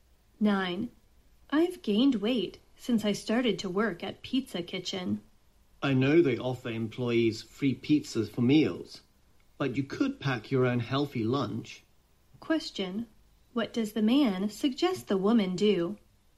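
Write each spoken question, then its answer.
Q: What does the man suggest the woman do?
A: Bring her own healthy lunch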